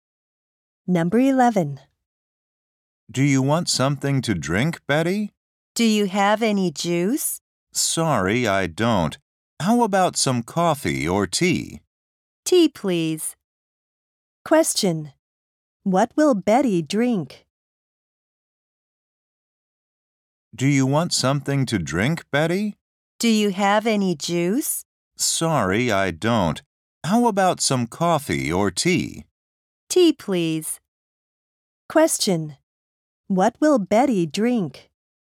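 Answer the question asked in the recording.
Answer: Tea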